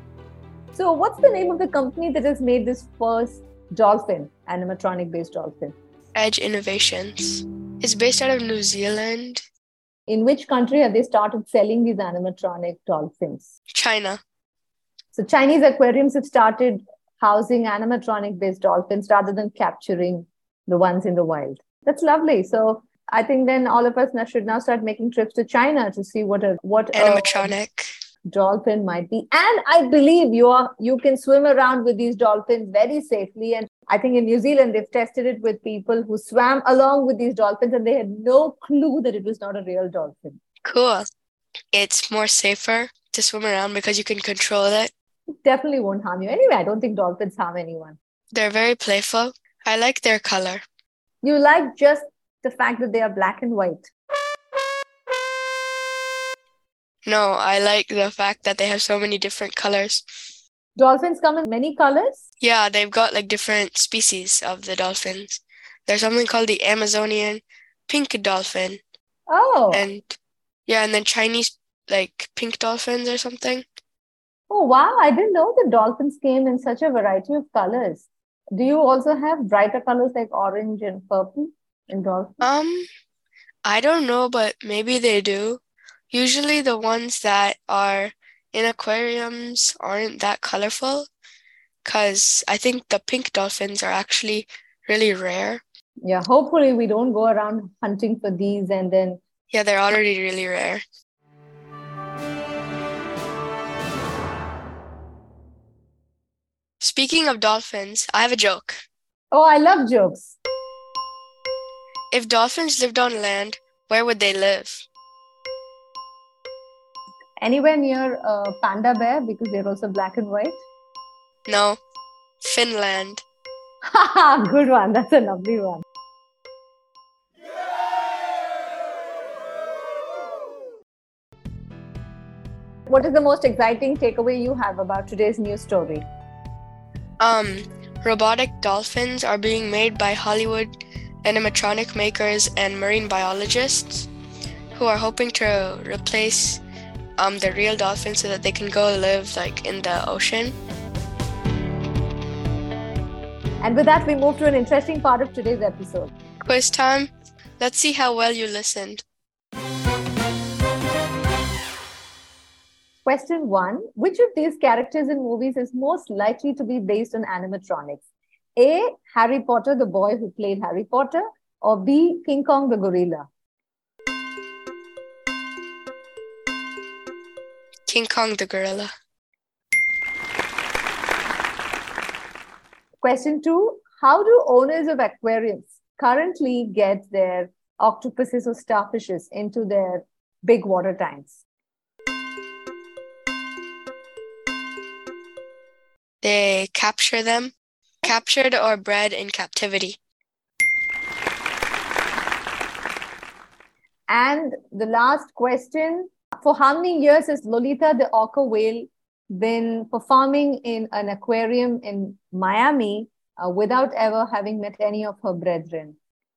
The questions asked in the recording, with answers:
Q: which of these characters in movies is most likely to be based on animatronics?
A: King Kong the gorilla.

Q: how do owners of aquariums currently get their octopuses or starfishes into their big water tanks?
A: They capture them, captured or bred in captivity.